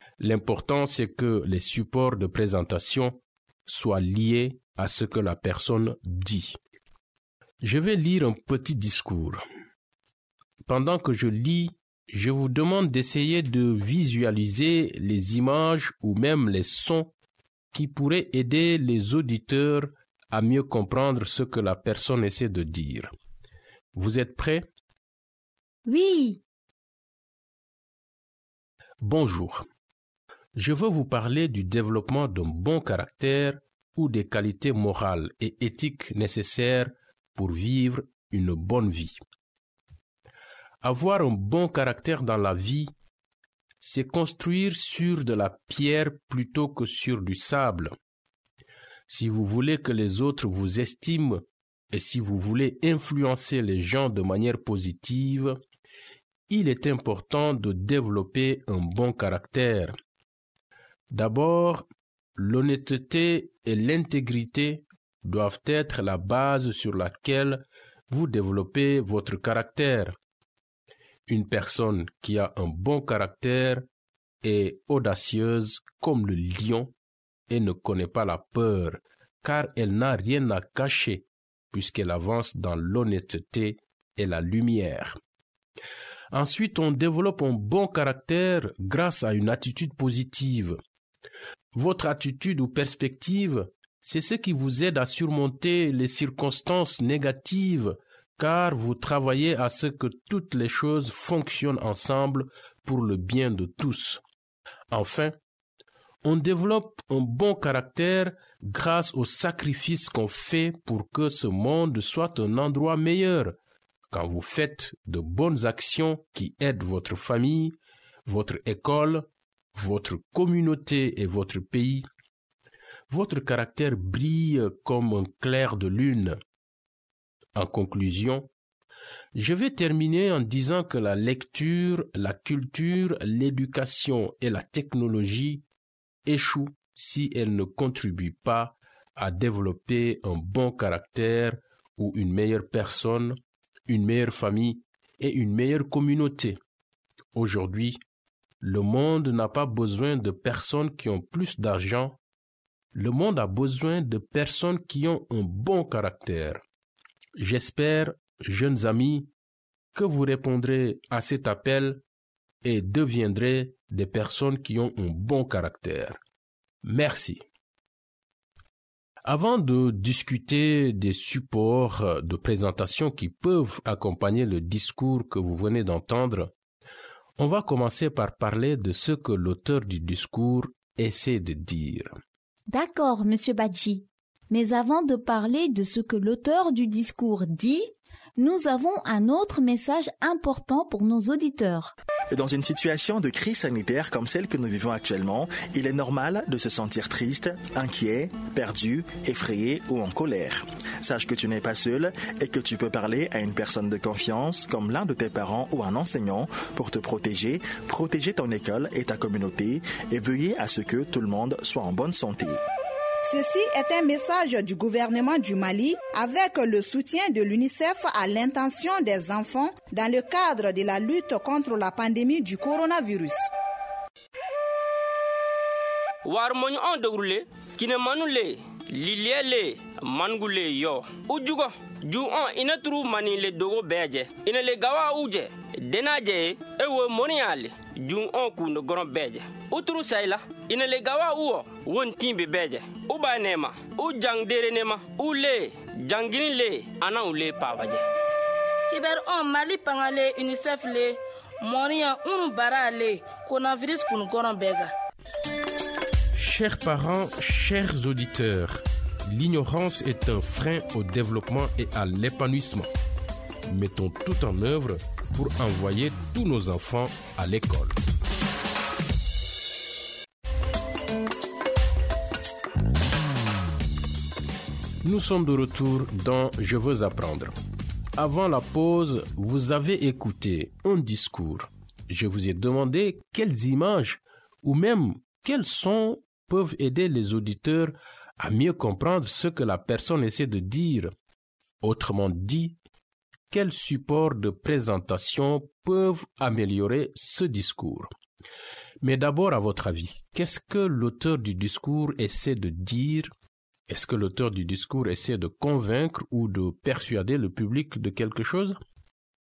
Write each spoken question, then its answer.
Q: Est-ce que l'auteur du discours essaie de convaincre ou de persuader le public de quelque chose?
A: Oui, l'auteur du discours essaie de convaincre les auditeurs de développer un bon caractère.